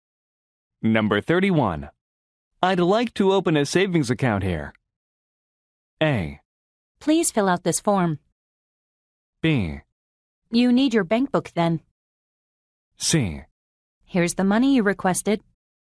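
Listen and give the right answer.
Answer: A: Please fill out this form.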